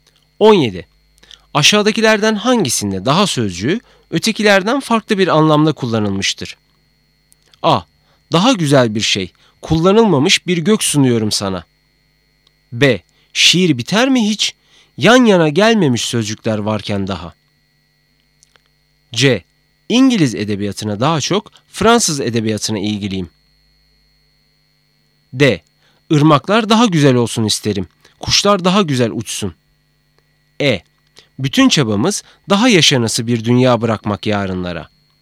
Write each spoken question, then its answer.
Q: Aşağıdakilerden hangisinde daha sözcüğü ötekilerden farklı bir anlamda kullanılmıştır?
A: Doğru cevap B.